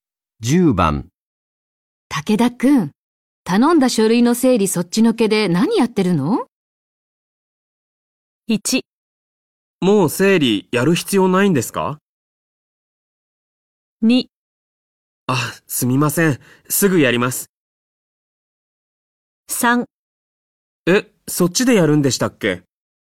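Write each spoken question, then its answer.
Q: 頼んだ書類の整理そっちのけで何やってるの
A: 2: あ、すみません。すぐやります。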